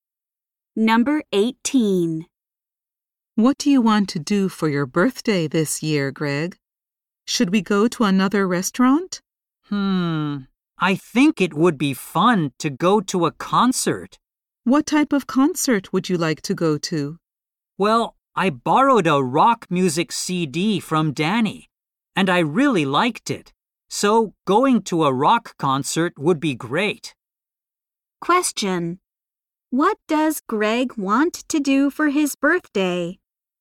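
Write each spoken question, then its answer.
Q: What does Greg want to do for his birthday?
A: Go to a rock concert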